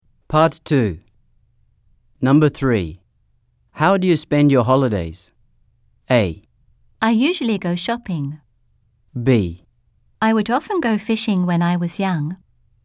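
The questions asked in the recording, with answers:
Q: How do you spend your holidays?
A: A: I usually go shopping.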